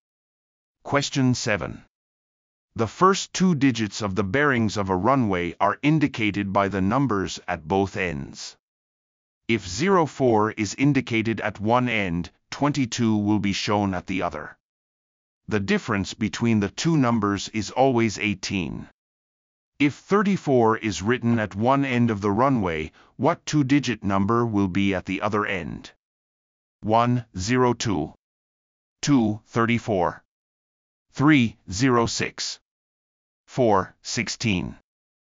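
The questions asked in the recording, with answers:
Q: If 34 is written at one end of the runway, what 2-digit number will be at the other end?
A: 4: 16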